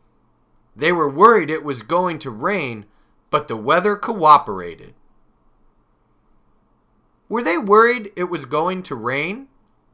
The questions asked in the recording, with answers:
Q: Were they worried it was going to rain?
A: Yes, they were. They were worried it was going to rain.